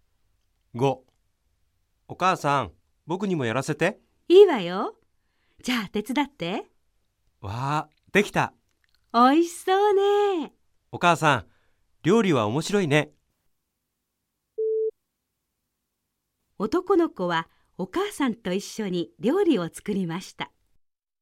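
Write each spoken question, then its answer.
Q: 男の子はお母さんと一緒に料理を作りました。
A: ○(正しい)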